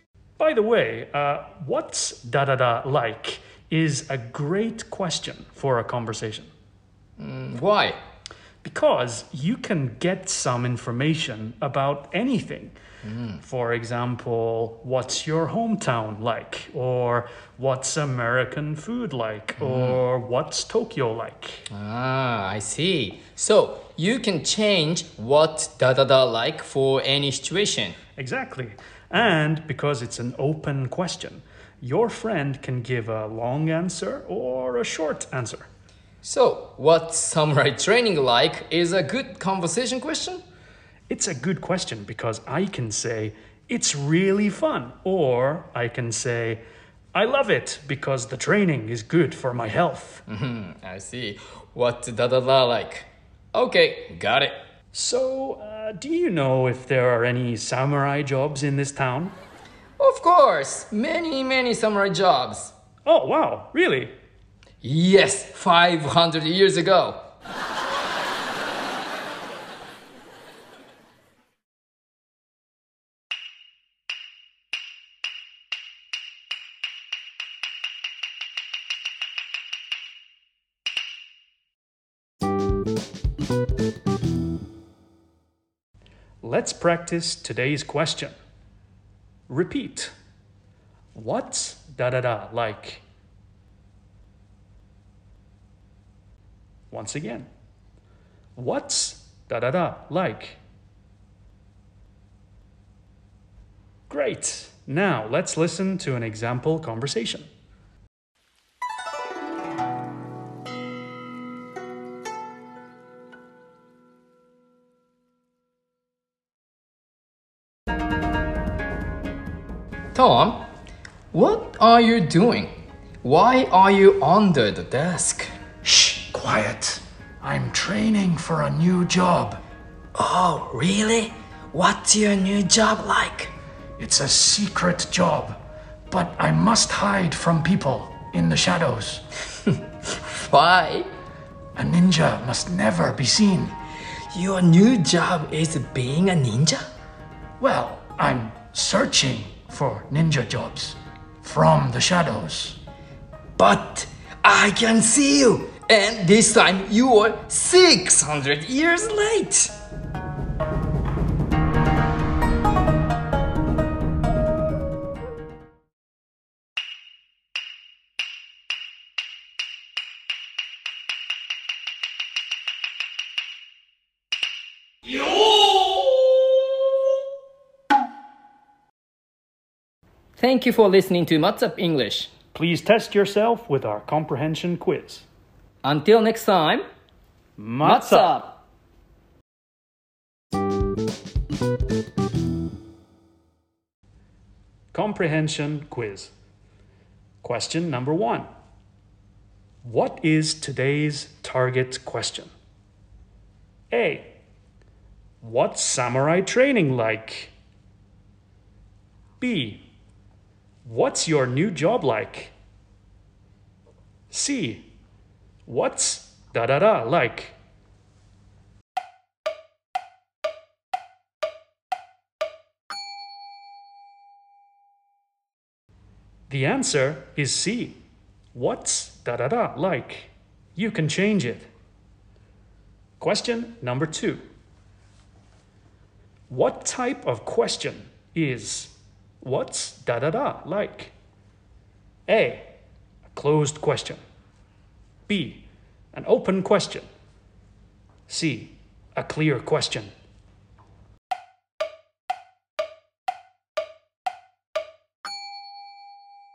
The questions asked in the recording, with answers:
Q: What is today's target question?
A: The answer is C. What's da-da-da like?

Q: What type of question is what's da-da-da like?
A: The answer is B, an open question.